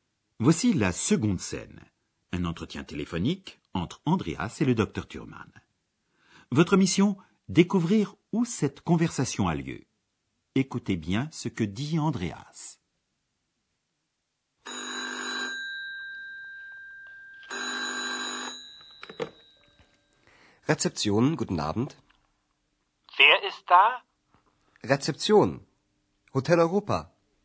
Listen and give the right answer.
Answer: Notre cours d'allemand se déroule donc à l'hôtel de l'Europe, où Andreas travaille comme réceptionniste ou portier.